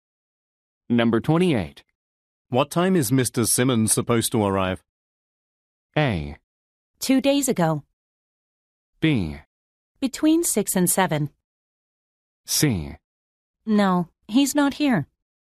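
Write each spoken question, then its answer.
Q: What time is Mr. Simmons supposed to arrive?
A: B: Between 6 and 7.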